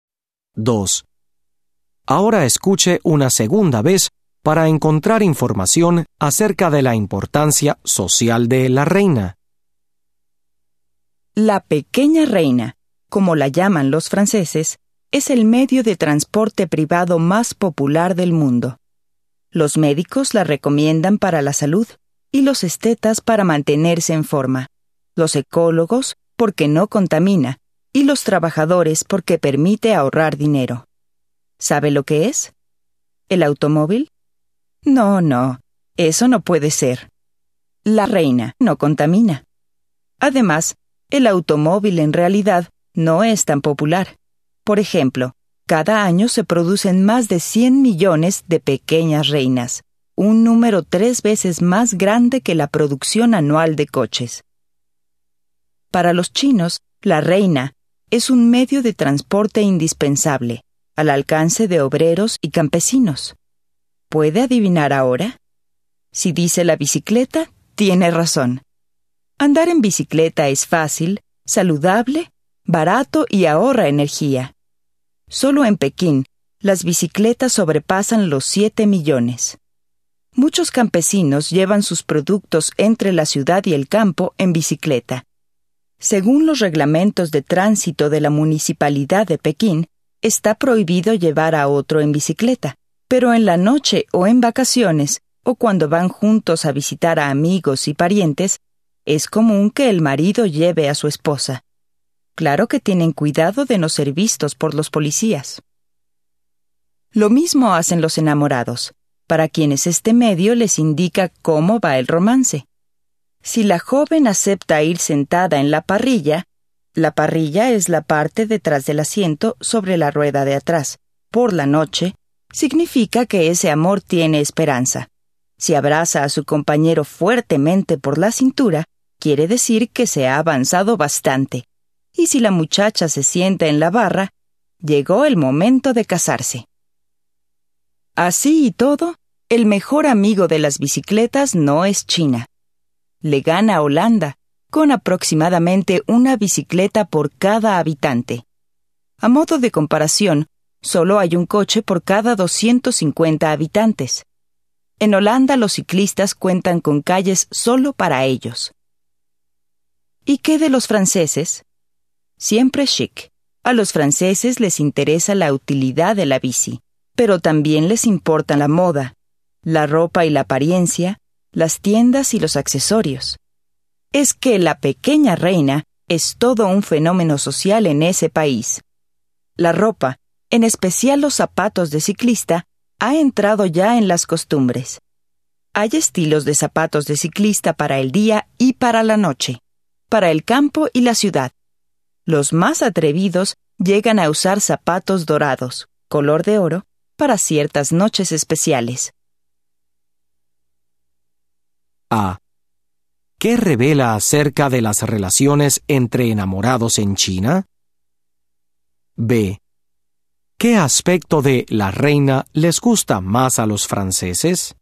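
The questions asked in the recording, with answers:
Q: ¿Qué revela acerca de las relaciones entre enamorados en China?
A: Indica cómo va el romance: si ella va en la parrilla de noche hay esperanza, si lo abraza por la cintura han avanzado bastante, y si se sienta en la barra es hora de casarse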